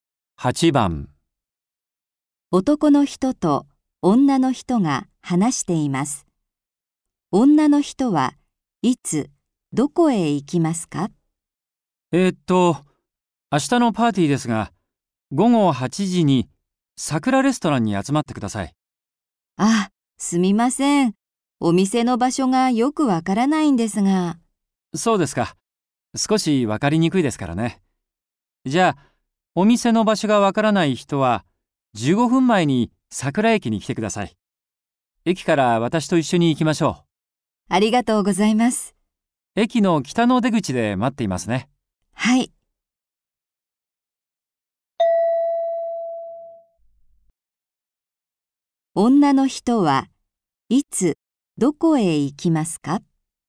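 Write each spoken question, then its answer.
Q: 女の人はいつどこへ行きますか?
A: 午後7時45分に桜駅(北の出口)へ行く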